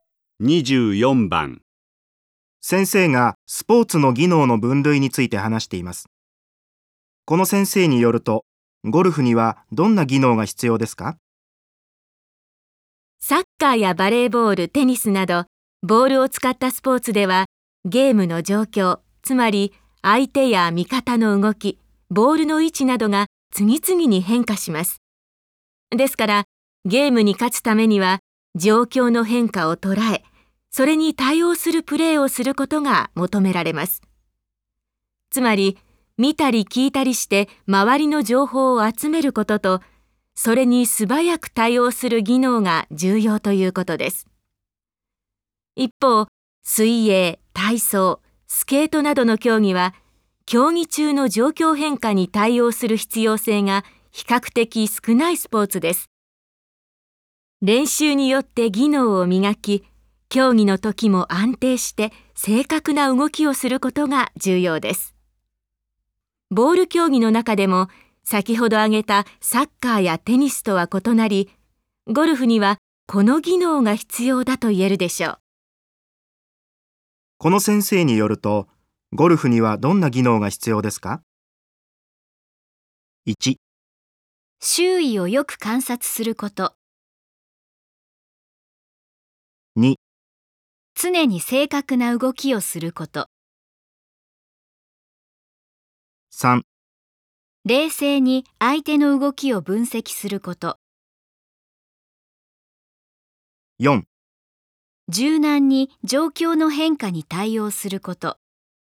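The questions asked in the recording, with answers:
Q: この先生によると、ゴルフにはどんな技能が必要ですか?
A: 2: 常に正確な動きをすること。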